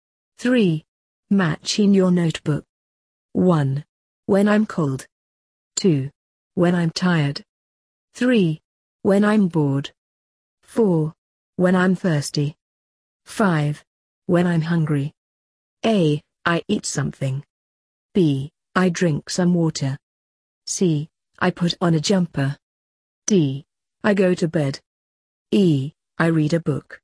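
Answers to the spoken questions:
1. C: I put on a jumper.
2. D: I go to bed.
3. E: I read a book.
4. B: I drink some water.
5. A: I eat something.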